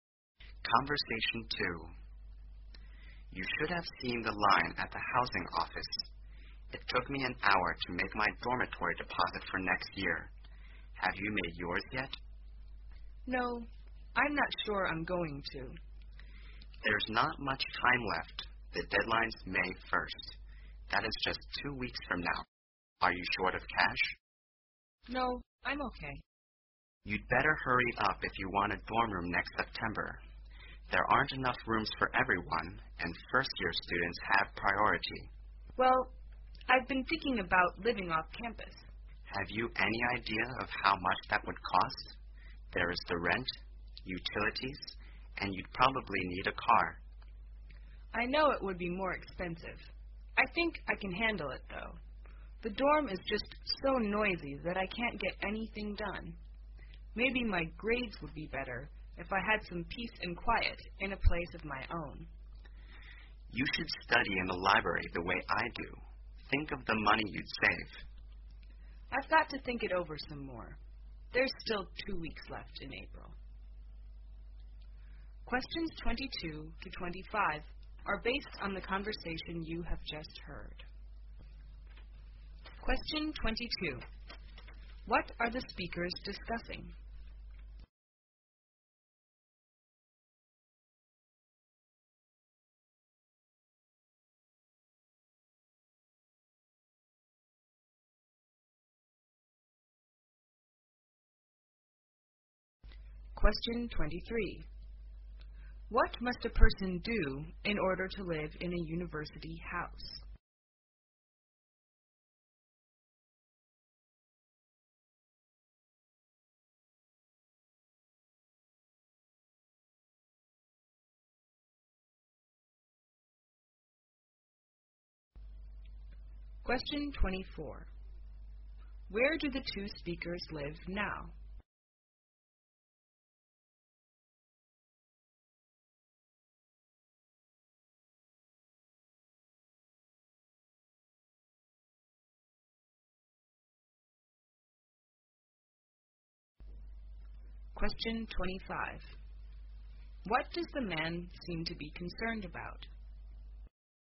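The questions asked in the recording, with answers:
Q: What are the speakers discussing?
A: Whether to live in a dorm or off campus next year

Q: What must a person do in order to live in a university house?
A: Pay a dormitory deposit by May 1st

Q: Where do the two speakers live now?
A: In a dormitory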